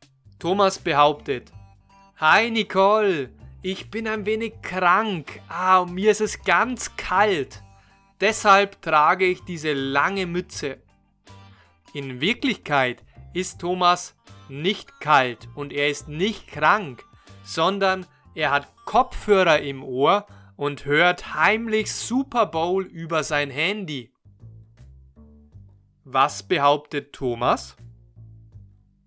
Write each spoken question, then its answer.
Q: Was behauptet Thomas?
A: Er behauptet, dass er ein wenig krank ist und dass es ihm kalt ist.